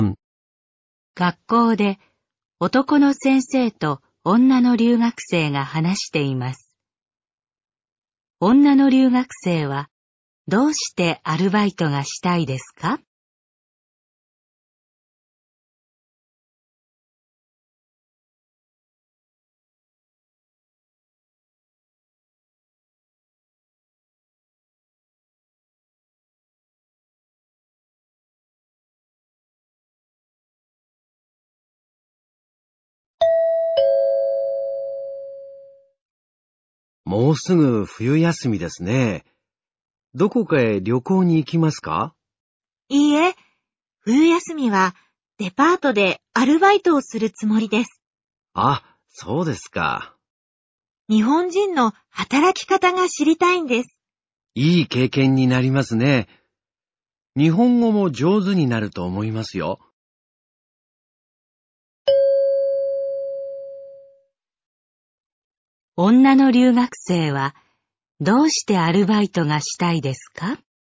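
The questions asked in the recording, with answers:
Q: 女の留学生はどうしてアルバイトがしたいですか?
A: 日本人の働き方が知りたいから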